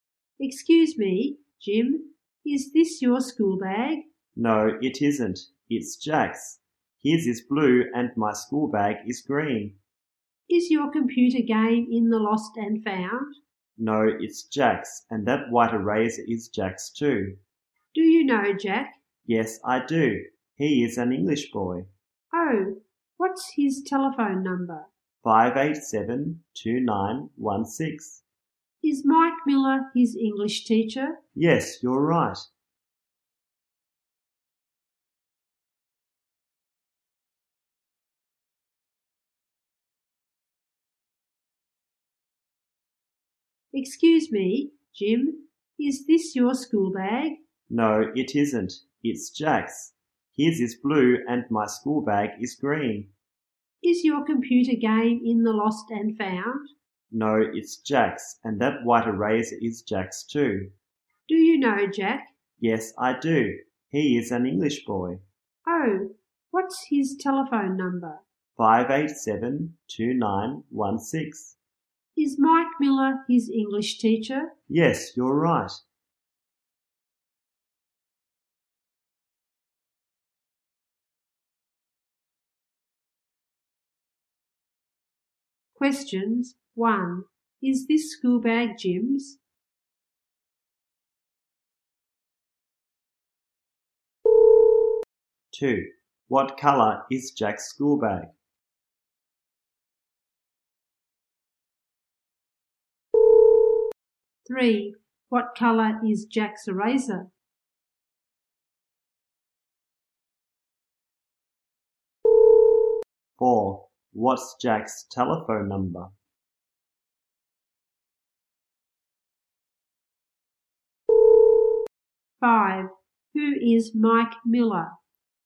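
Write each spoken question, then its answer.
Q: Is this school bag Jim's?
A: No, it isn't

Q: What colour is Jack's school bag?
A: Blue

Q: What colour is Jack's eraser?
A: White

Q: What's Jack's telephone number?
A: 587-2916

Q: Who is Mike Miller?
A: Jack's English teacher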